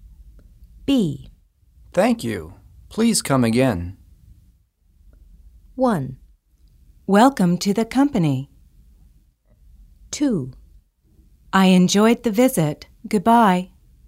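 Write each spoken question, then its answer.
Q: Thank you. Please come again.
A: 2: I enjoyed the visit. Goodbye.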